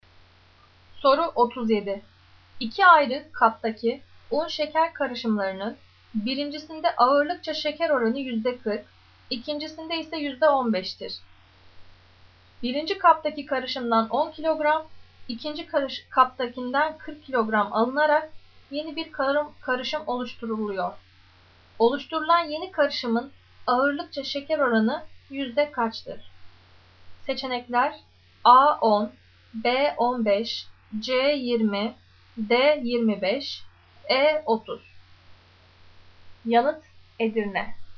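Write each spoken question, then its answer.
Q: Oluşturulan yeni karışımın ağırlıkça şeker oranı yüzde kaçtır?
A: C: 20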